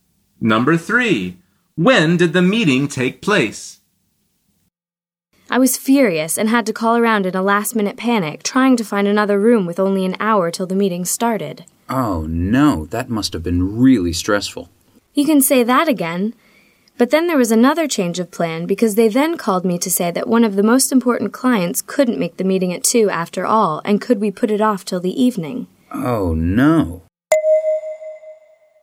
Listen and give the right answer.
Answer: The answer is in the evening.